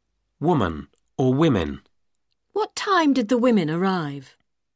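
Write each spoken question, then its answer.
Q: Woman or women.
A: women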